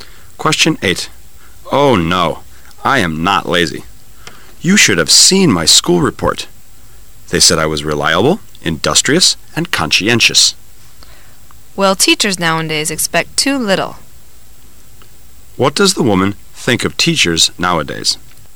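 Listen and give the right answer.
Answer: Their standards are too low; they expect too little.

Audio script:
[解析] M: Oh, no, I am not lazy. You should have seen my school report! They said I was reliable, industrious and conscientious. W: Well, teachers nowadays expect too little. Q: What does the woman think of teachers nowadays?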